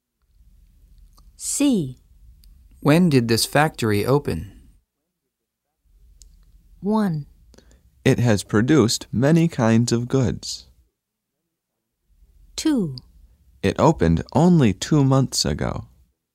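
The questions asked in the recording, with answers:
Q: When did this factory open?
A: 2: It opened only 2 months ago.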